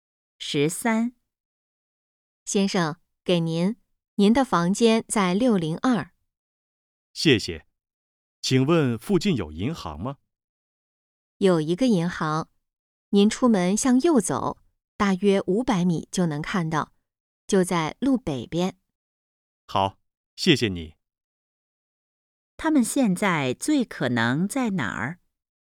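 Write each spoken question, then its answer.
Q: 他们现在最可能在哪儿?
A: 宾馆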